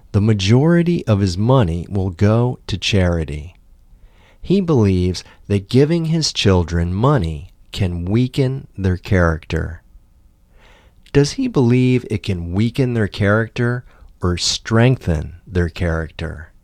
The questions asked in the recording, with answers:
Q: Does he believe it can weaken their character or strengthen their character?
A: He believes it can weaken their character.